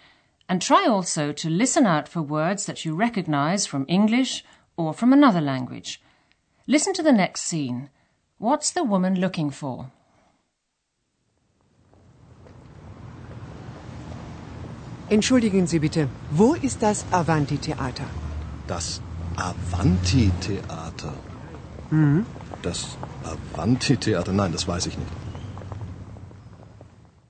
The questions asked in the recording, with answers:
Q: What's the woman looking for?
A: She's looking for the Avanti Theater.